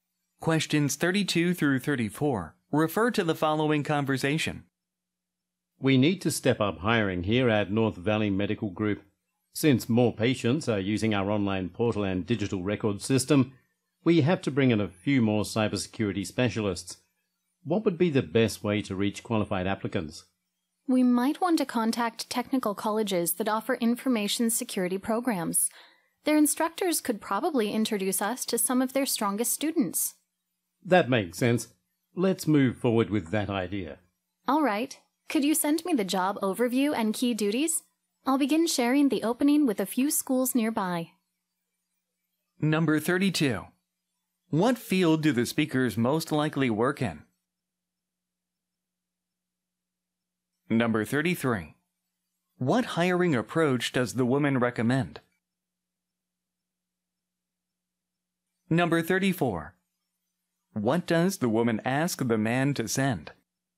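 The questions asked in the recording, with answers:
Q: What field do the speakers most likely work in?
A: Health care (medical)

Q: What hiring approach does the woman recommend?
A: Contacting technical colleges with information security programs

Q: What does the woman ask the man to send?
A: The job overview and key duties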